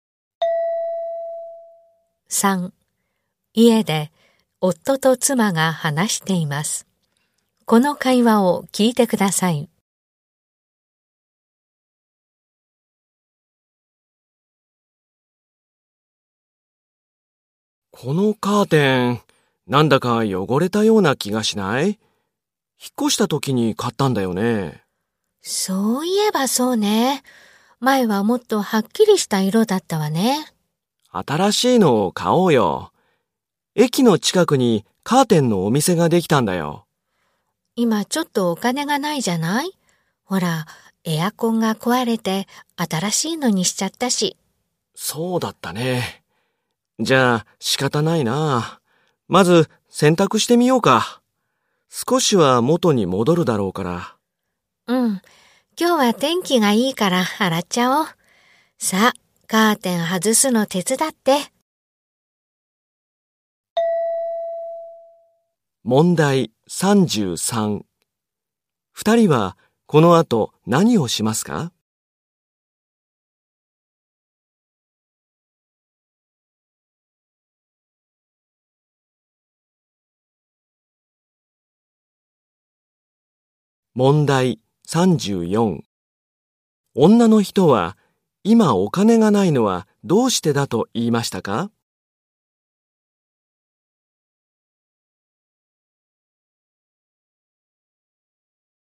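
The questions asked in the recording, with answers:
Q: 二人はこの後何をしますか?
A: カーテンを外して洗濯する

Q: 女の人は今お金がないのはどうしてだと言いましたか?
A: エアコンが壊れて新しいのを買ったから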